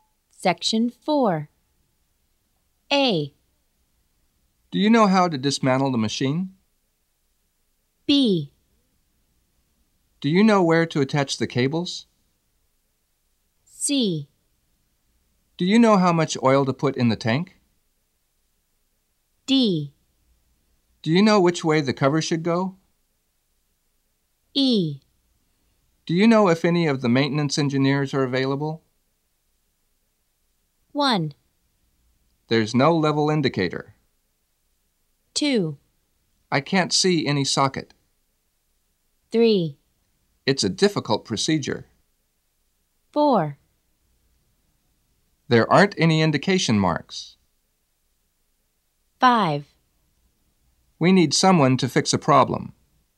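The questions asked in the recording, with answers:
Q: There's no level indicator.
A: C: Do you know how much oil to put in the tank?

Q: I can't see any socket.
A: B: Do you know where to attach the cables?

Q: It's a difficult procedure.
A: A: Do you know how to dismantle the machine?

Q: There aren't any indication marks.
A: D: Do you know which way the cover should go?

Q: We need someone to fix a problem.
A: E: Do you know if any of the maintenance engineers are available?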